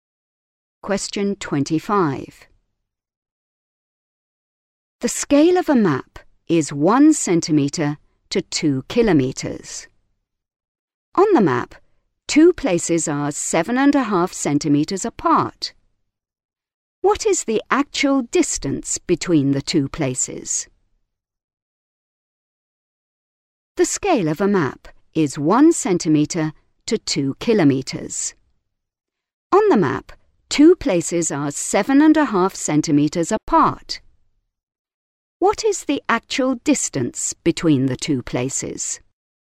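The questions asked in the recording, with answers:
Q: What is the actual distance between the two places?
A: 15 kilometres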